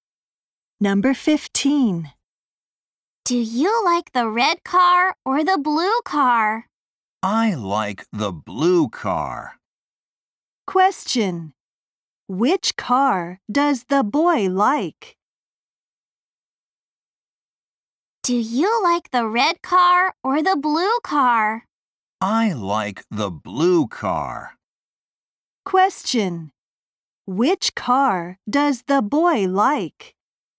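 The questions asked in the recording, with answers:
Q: Which car does the boy like?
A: The blue car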